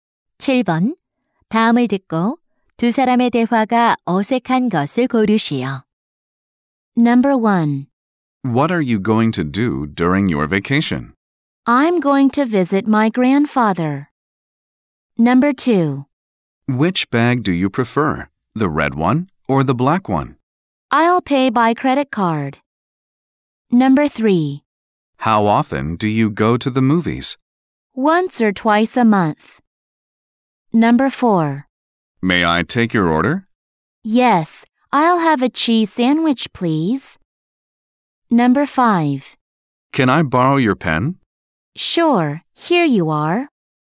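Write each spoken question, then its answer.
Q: 다음을 듣고 두 사람의 대화가 어색한 것을 고르시오.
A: 2번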